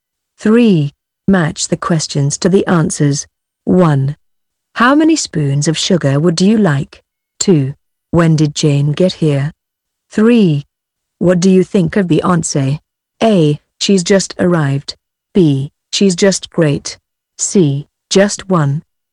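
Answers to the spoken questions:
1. C: Just one.
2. A: She's just arrived.
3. B: She's just great.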